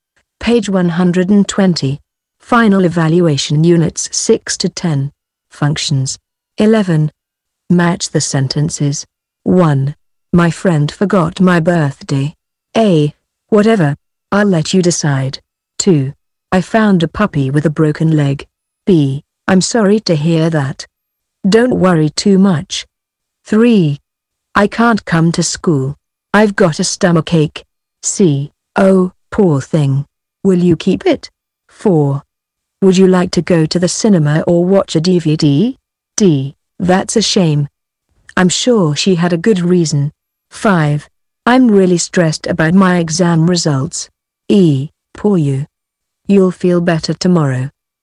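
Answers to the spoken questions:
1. D: That's a shame. I'm sure she had a good reason.
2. C: Oh, poor thing. Will you keep it?
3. E: Poor you. You'll feel better tomorrow.
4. A: Whatever. I'll let you decide.
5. B: I'm sorry to hear that. Don't worry too much.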